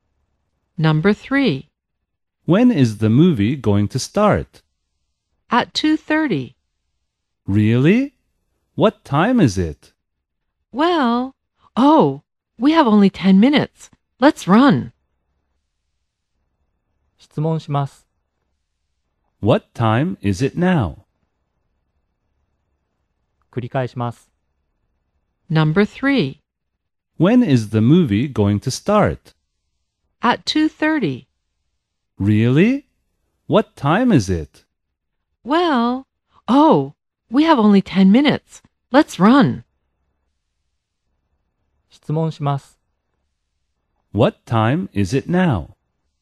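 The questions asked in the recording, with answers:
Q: What time is it now?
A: 2:20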